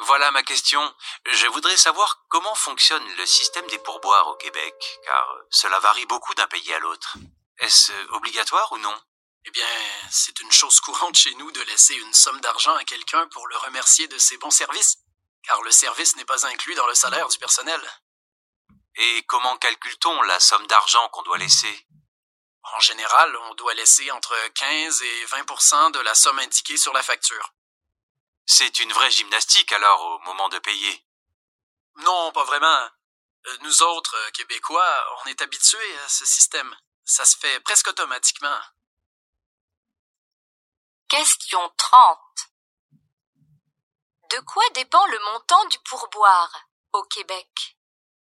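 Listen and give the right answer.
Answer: Du montant de la facture (15 à 20 %)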